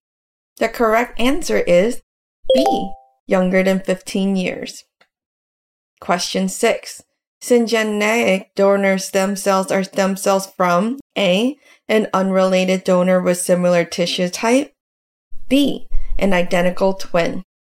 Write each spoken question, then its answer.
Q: Syngeneic donor stem cells are stem cells from A, an unrelated donor with similar tissue type, B, an identical twin.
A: The correct answer is B, an identical twin.